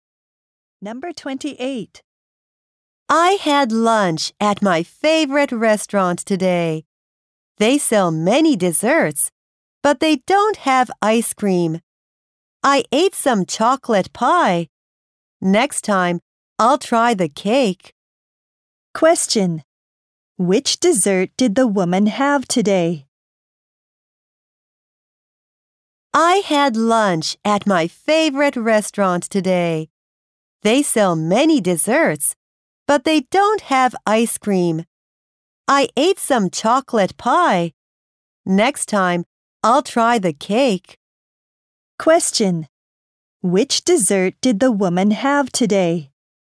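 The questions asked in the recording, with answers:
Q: Which dessert did the woman have today?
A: Chocolate pie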